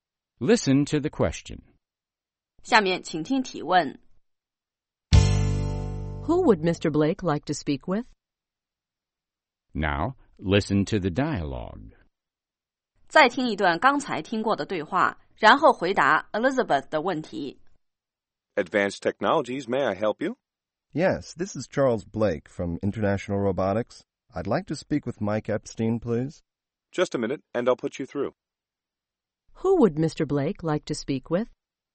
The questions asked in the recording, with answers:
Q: Who would Mr. Blake like to speak with?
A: He'd like to speak with Mr. Epstein.